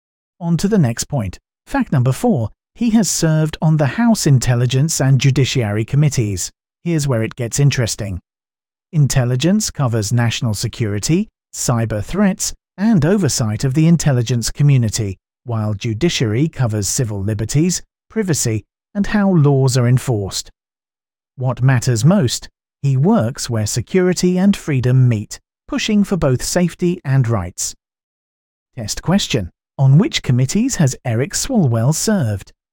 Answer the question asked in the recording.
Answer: House Intelligence and Judiciary Committees.